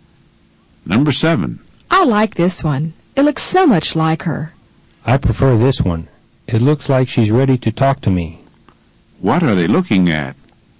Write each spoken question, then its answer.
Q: What are they looking at?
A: They're looking at photographs.